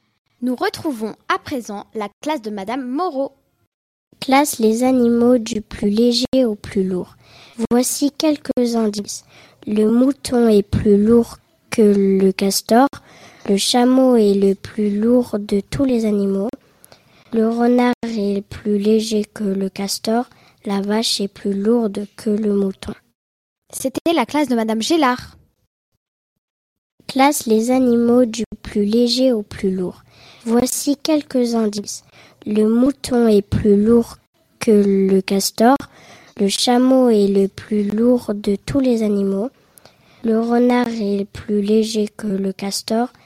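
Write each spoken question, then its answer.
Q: Classe les animaux du plus léger au plus lourd.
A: renard, castor, mouton, vache, chameau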